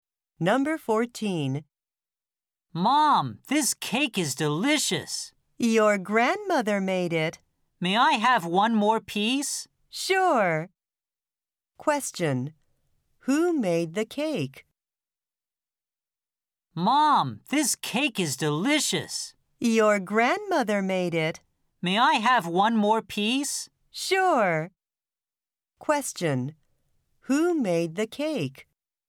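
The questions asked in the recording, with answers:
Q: Who made the cake?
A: The grandmother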